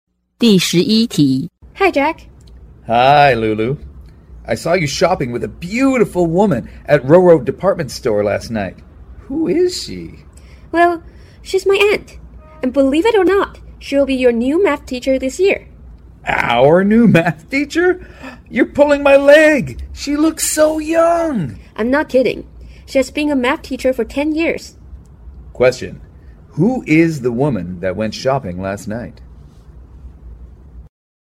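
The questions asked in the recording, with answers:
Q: Who is the woman that went shopping last night?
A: Lulu's aunt, their new math teacher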